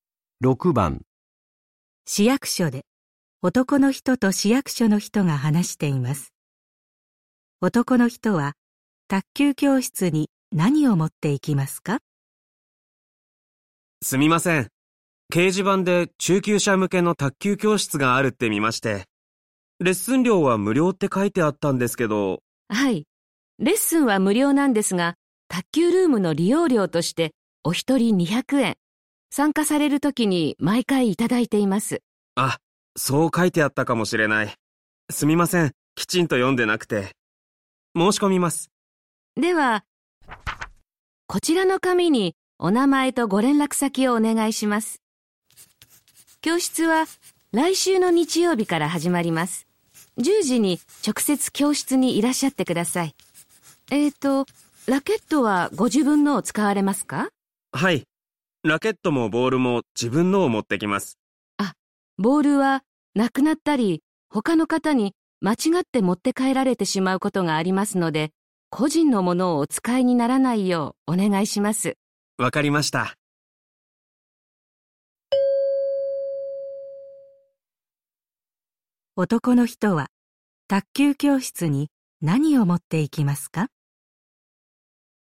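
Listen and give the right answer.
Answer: ラケットと利用料の200円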